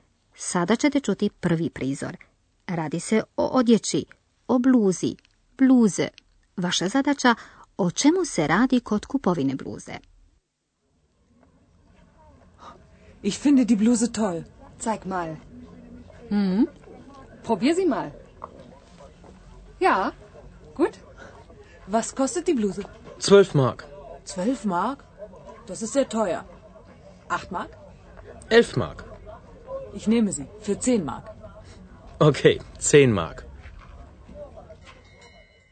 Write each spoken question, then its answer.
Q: Vaša zadaća o čemu se radi kod kupovine bluze.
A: Radi se o pokušaju kako sniziti cijenu.